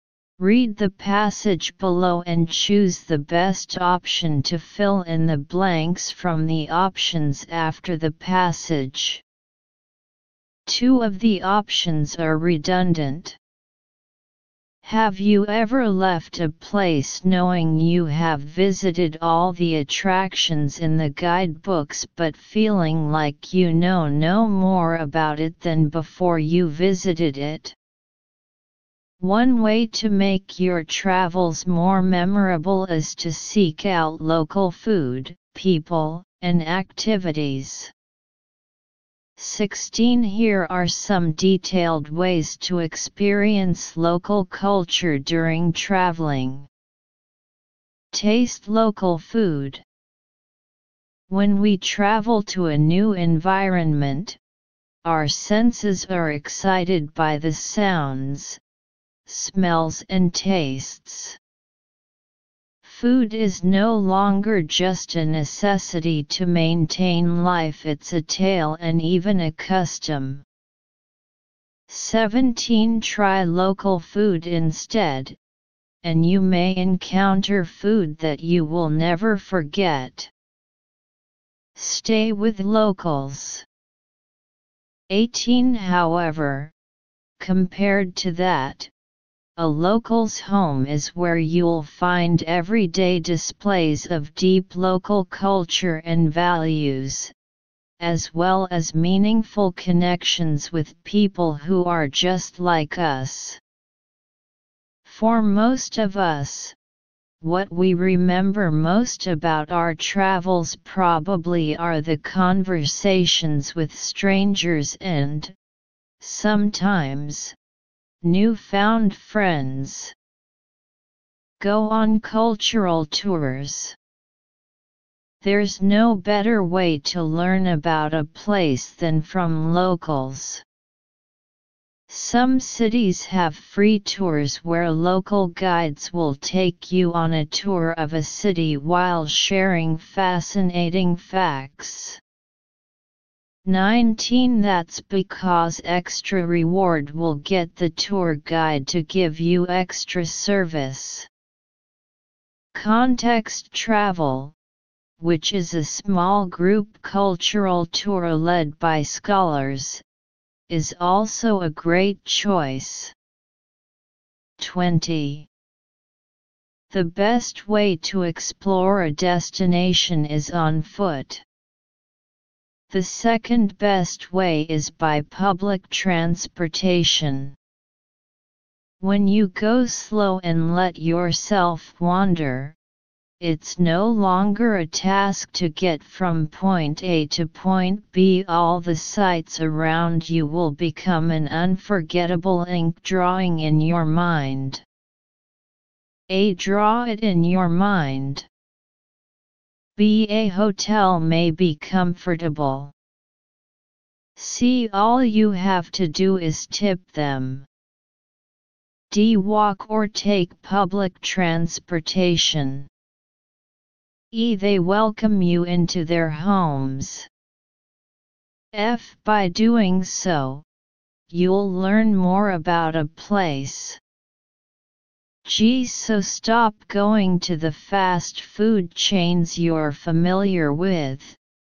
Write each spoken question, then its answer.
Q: 16. Here are some detailed ways to experience local culture during traveling.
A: 16. F.

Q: 17. Try local food instead, and you may encounter food that you will never forget.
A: 17. G.

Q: 18. However, compared to that, a local's home is where you'll find everyday displays of deep local culture and values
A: 18. B.

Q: 19. That's because extra reward will get the tour guide to give you extra service.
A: 19. C.

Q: 20. The best way to explore a destination is on foot.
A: 20. D.